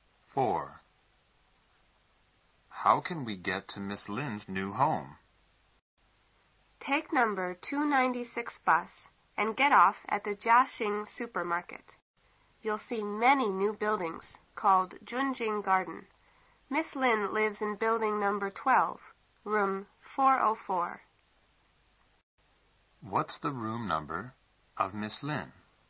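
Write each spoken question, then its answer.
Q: What's the room number of Miss Lin?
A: Room 404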